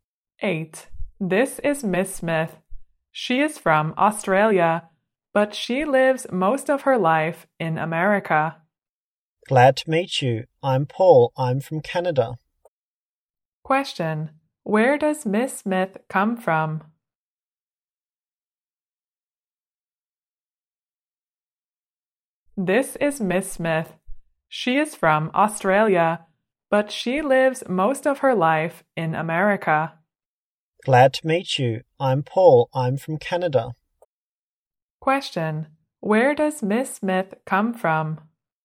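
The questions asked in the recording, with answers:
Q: Where does Miss Smith come from?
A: Australia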